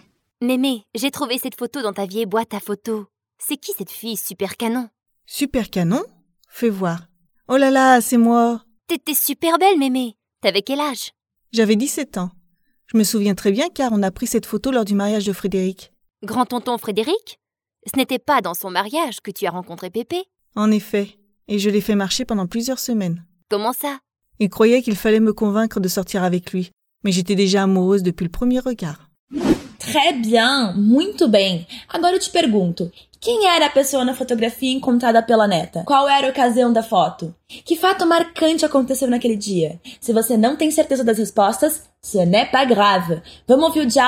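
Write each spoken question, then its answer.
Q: quem era a pessoa na fotografia encontrada pela neta?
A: A própria avó (Mémé), aos 17 anos

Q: Qual era a ocasião da foto?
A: O casamento de Frédéric (o tio-avô)

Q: Que fato marcante aconteceu naquele dia?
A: A avó conheceu o avô (Pépé)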